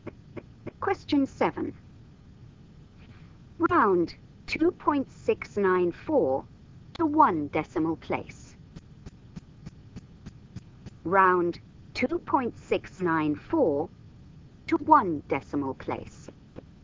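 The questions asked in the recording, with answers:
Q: Round 2.694 to one decimal place.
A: 2.7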